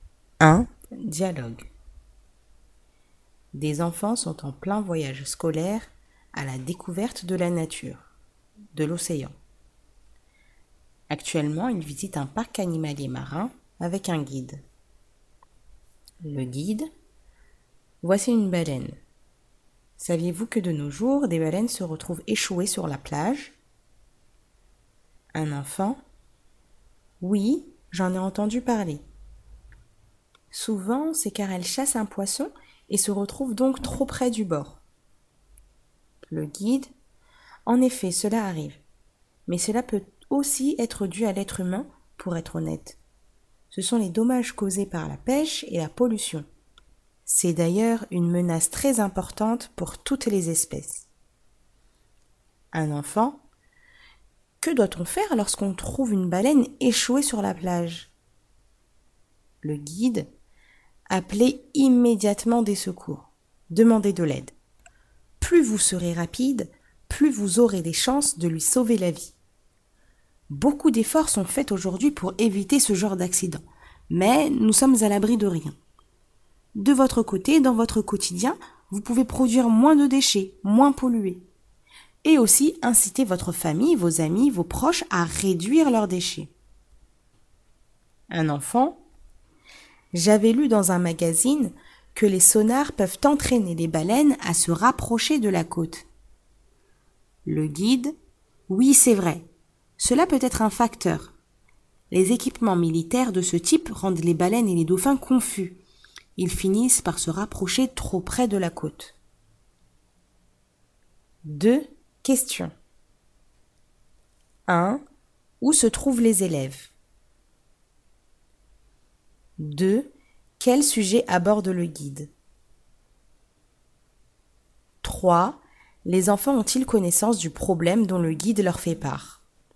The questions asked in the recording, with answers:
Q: Où se trouvent les élèves?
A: Ils sont dans un parc animalier marin.

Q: Quel sujet aborde le guide?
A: Les baleines qui s'échouent sur les plages.

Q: Les enfants ont-ils connaissance du problème dont le guide leur fait part?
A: Oui, ils connaissent même certaines causes de ce problème.